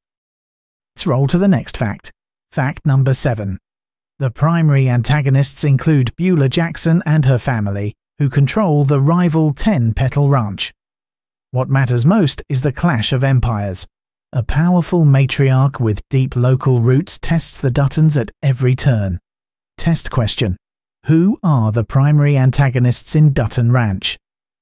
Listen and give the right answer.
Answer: Beulah Jackson and her family.